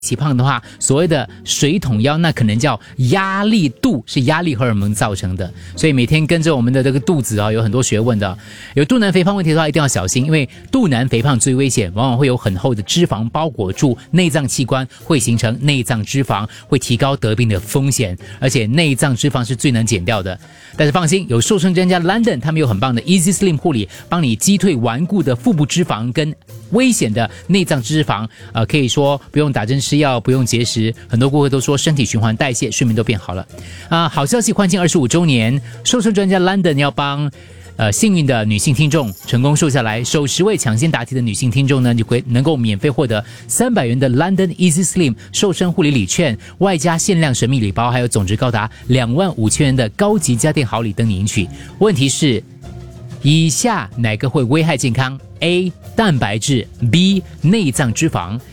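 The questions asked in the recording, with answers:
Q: 问题是,以下哪个会危害健康?A. 蛋白质 B. 内脏脂肪。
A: B: 内脏脂肪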